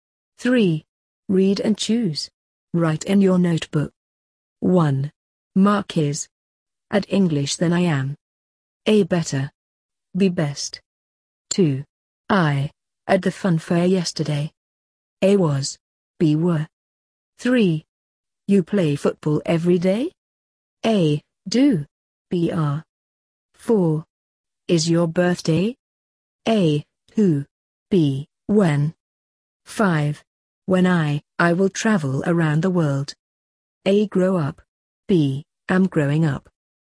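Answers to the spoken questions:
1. A: better
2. A: was
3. A: Do
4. B: When
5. A: Grow up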